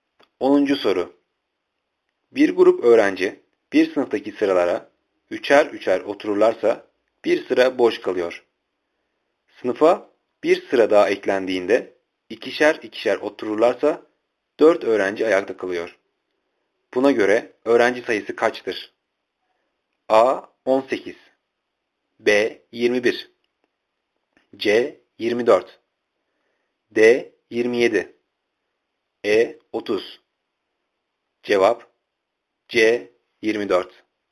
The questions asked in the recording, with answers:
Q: Buna göre öğrenci sayısı kaçtır?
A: Cevap C. 24